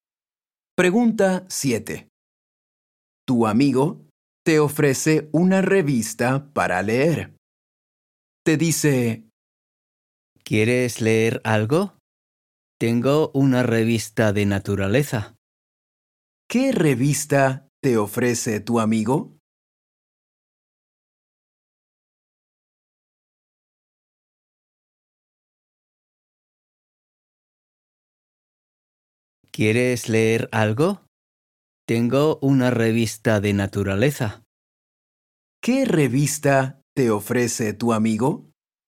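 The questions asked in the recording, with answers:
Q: ¿Qué revista te ofrece tu amigo?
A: Una revista de naturaleza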